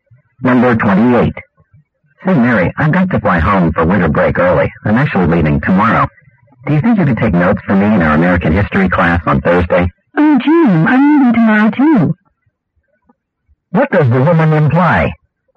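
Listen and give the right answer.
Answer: She can't take notes for him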